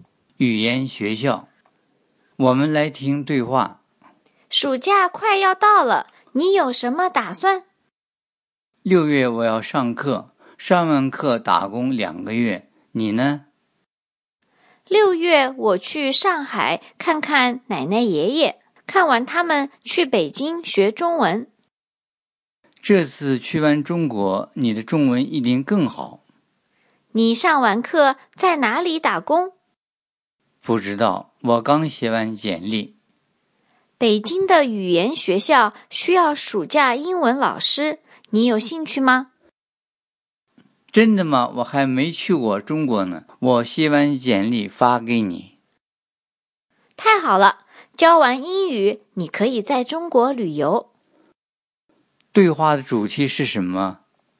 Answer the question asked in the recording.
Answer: Main topic of the dialogue is 暑假的打算,暑假做什么?